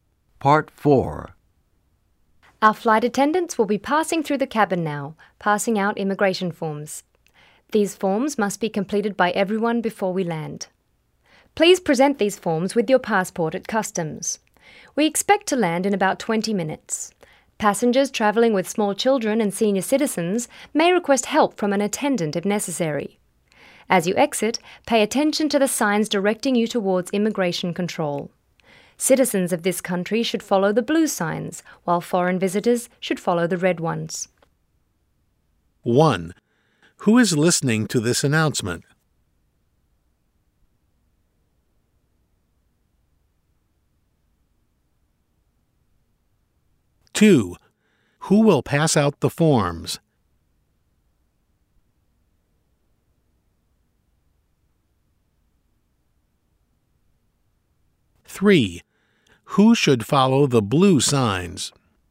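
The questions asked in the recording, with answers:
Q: Who is listening to this announcement?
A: Airplane passengers

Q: Who will pass out the forms?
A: Flight attendants

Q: Who should follow the blue signs?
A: Citizens of this country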